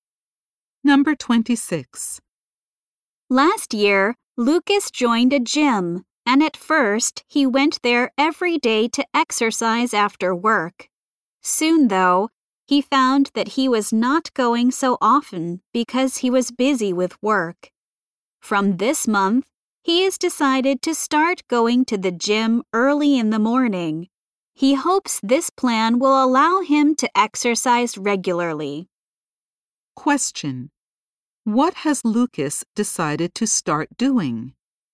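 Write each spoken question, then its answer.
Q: What has Lucas decided to start doing?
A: Going to the gym early in the morning.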